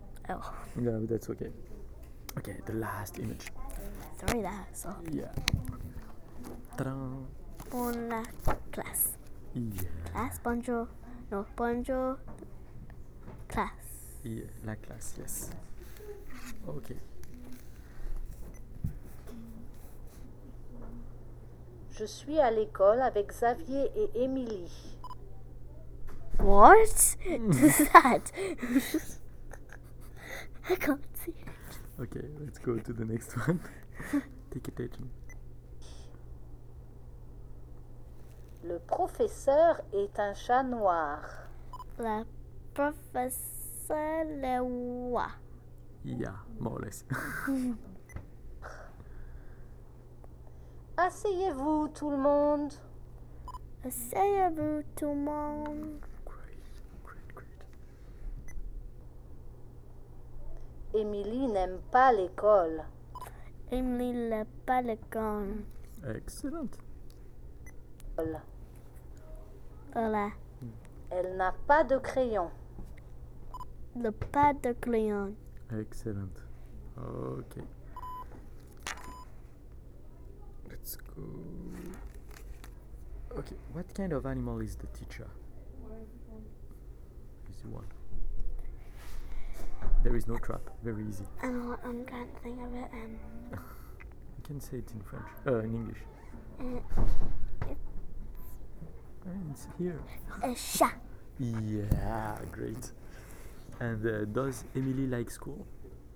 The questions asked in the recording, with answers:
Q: what kind of animal is the teacher?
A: A chat.

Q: And does Emily like school?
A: No, she doesn't like it.